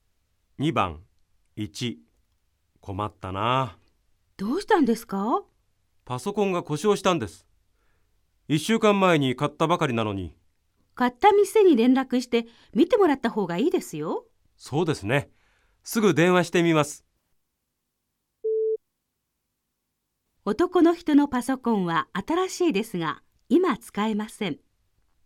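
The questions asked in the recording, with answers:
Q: 男の人のパソコンは新しいですが今使えません。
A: ○(正しい)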